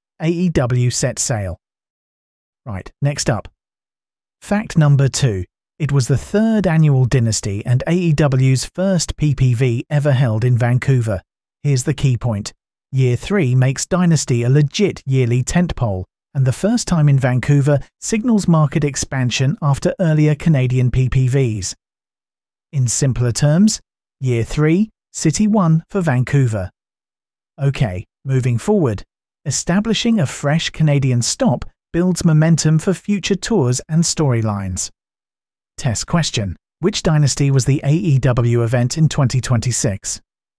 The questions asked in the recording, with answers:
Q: Which Dynasty was the AEW event in 2026?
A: Third annual Dynasty.